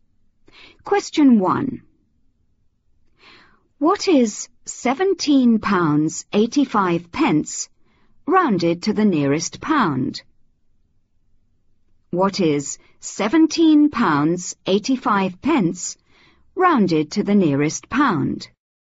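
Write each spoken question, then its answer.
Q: What is 17 pounds 85 pence rounded to the nearest pound?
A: £18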